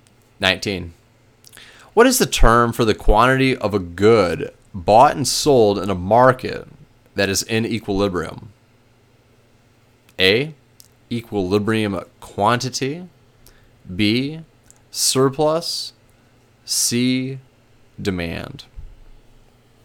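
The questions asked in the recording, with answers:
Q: What is the term for the quantity of a good bought and sold in a market that is in equilibrium?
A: A: equilibrium quantity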